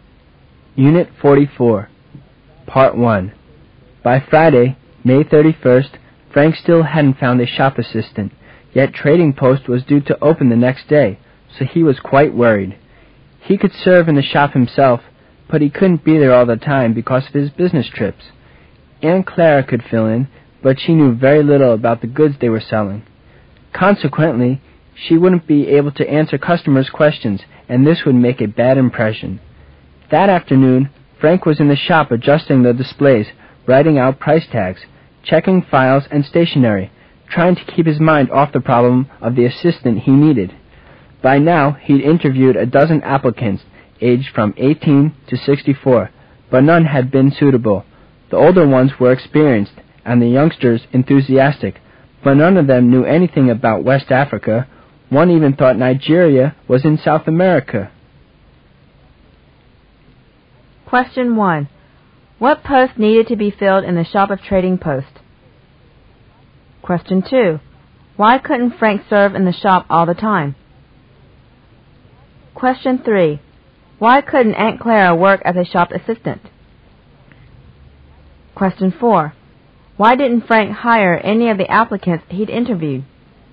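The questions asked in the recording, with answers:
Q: What post needed to be filled in the Shop of Trading Post?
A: Shop assistant

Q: Why couldn't Frank serve in the shop all the time?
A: Because of his business trips

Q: Why couldn't Aunt Clara work as a shop assistant?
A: She knew very little about the goods

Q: Why didn't Frank hire any of the applicants he'd interviewed?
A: None knew anything about West Africa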